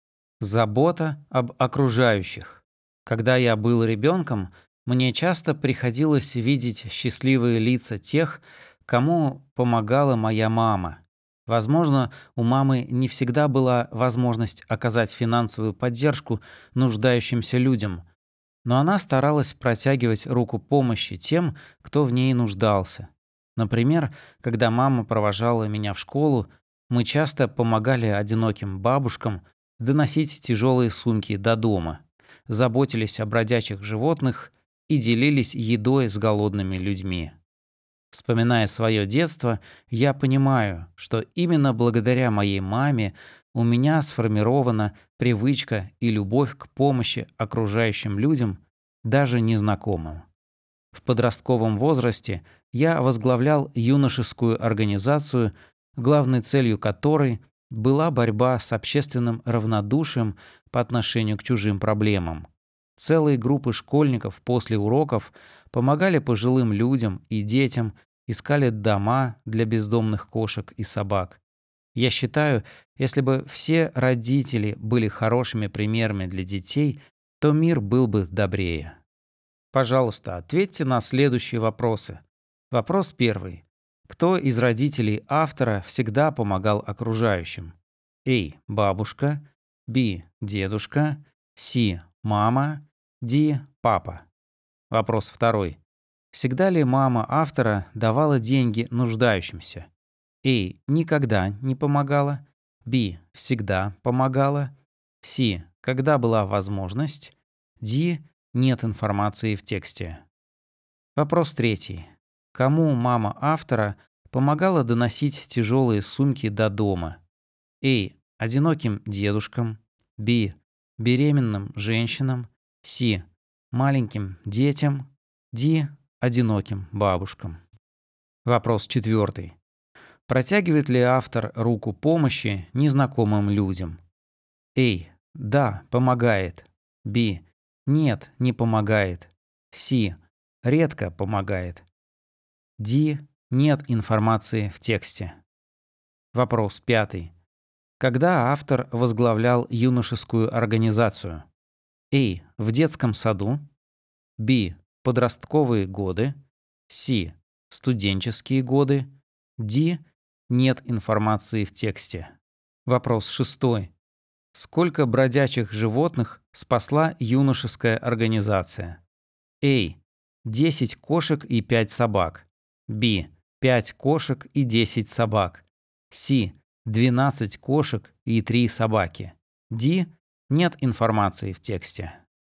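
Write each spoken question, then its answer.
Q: Кто из родителей автора всегда помогал окружающим?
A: C: Мама

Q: Кому мама автора помогала доносить тяжелые сумки до дома?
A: D: Одиноким бабушкам

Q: Протягивает ли автор руку помощи незнакомым людям?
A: A: Да, помогает

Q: Когда автор возглавлял юношескую организацию?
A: B: Подростковые годы

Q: Сколько бродячих животных спасла юношеская организация?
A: D: Нет информации в тексте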